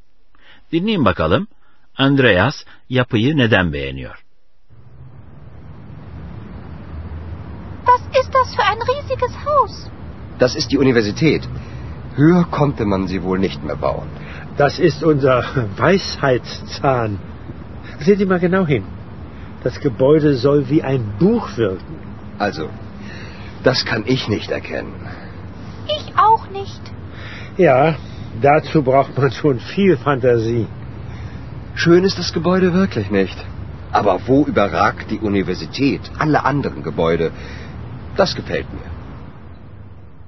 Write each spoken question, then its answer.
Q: Andreas yapıyı neden beğeniyor?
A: Andreas üniversite binasını bütün öteki binalara hakim olduğu için beğeniyor.